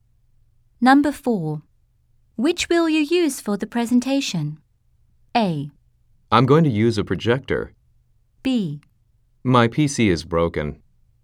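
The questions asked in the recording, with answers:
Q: Which will you use for the presentation?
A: A: I'm going to use a projector.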